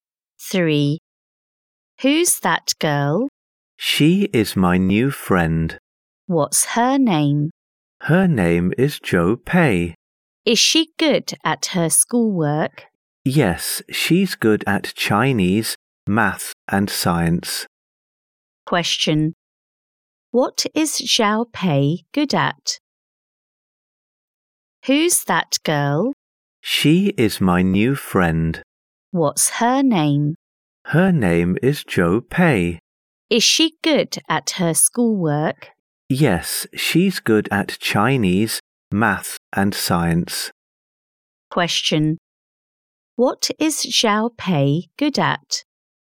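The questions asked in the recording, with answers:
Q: What is Xiao Pei good at?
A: Chinese, math and science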